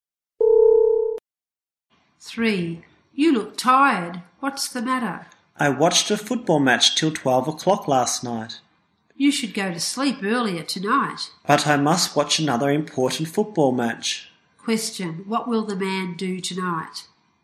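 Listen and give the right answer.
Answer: Watch another important football match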